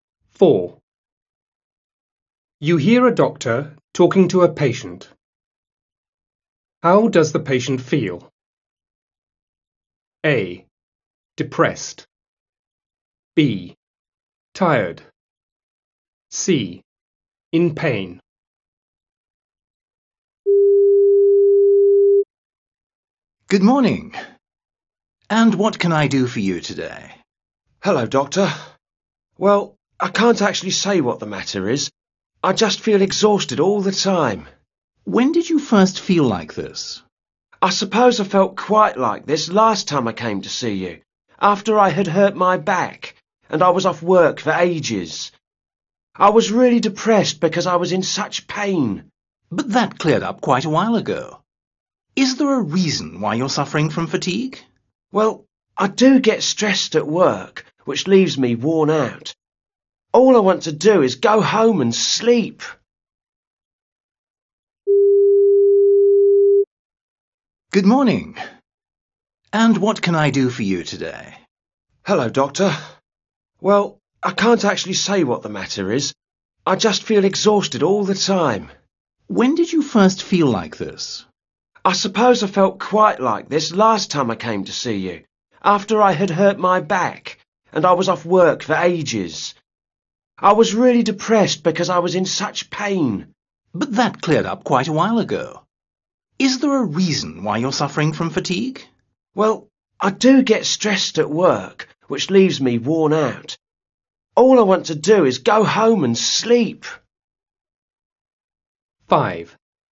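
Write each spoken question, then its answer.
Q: How does the patient feel?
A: B: Tired.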